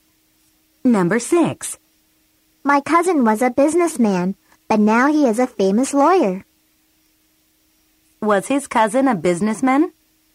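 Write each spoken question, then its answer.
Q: Was his cousin a businessman?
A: Yes, he was.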